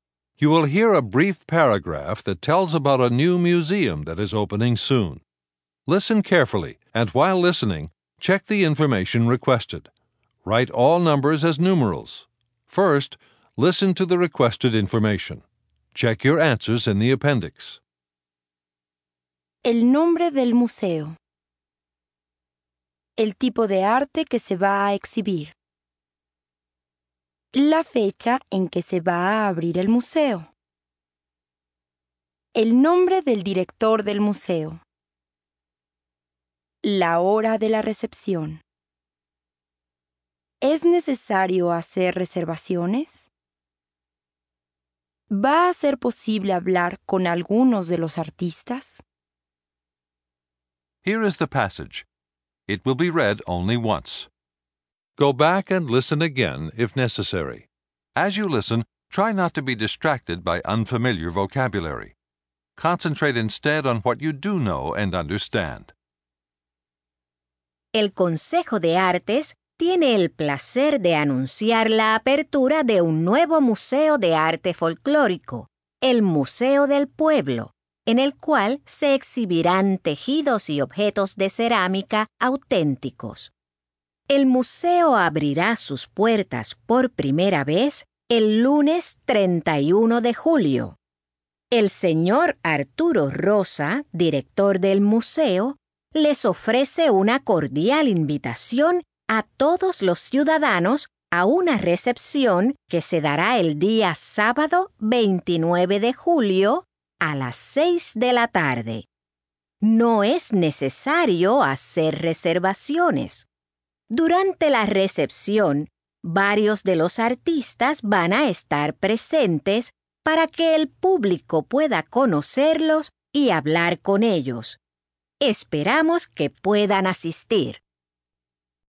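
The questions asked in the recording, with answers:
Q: El nombre del museo.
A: Museo del Pueblo

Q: El tipo de arte que se va a exhibir.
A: Arte folclórico: tejidos y objetos de cerámica

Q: La fecha en que se va a abrir el museo.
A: El lunes 31 de julio

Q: El nombre del director del museo.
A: Arturo Rosa

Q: La hora de la recepción.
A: A las 6 de la tarde (sábado 29 de julio)

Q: ¿Es necesario hacer reservaciones?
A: No

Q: ¿Va a ser posible hablar con algunos de los artistas?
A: Sí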